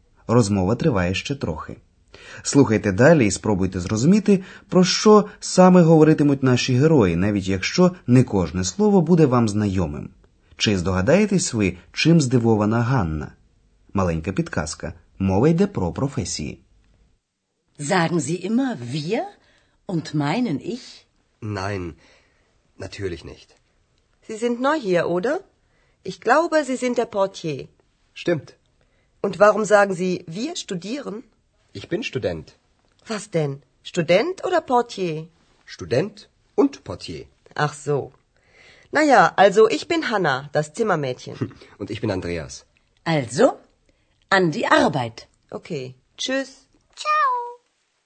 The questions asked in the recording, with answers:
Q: Чи здогадаєтесь ви, чим здивована Ганна?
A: Ганна здивована тим, що Андреас називає себе студентом, хоча трохи раніше він говорив, що працює в готелі Портьє.